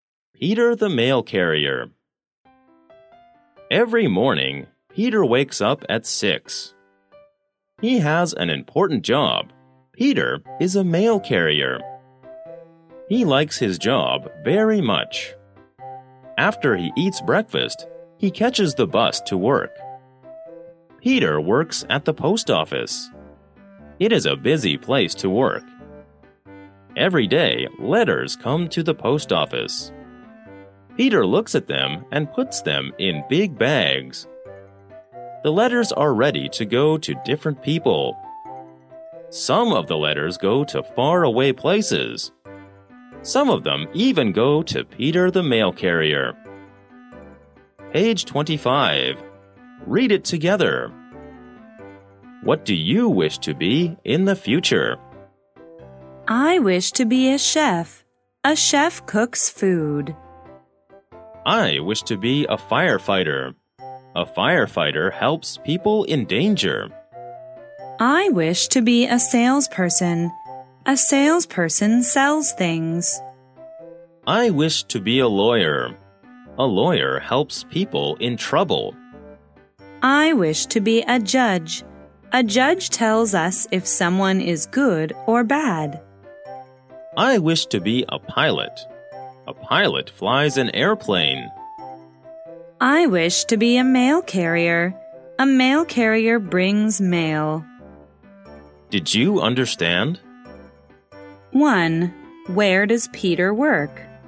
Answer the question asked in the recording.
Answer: He works at the post office.